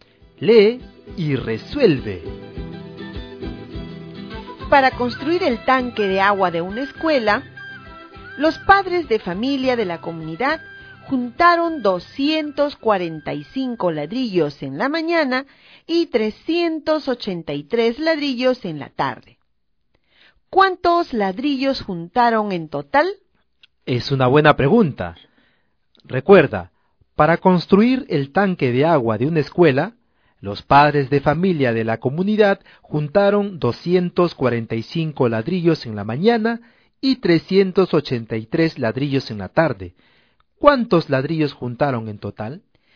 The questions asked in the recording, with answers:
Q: ¿Cuántos ladrillos juntaron en total?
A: nos dan el total de 628.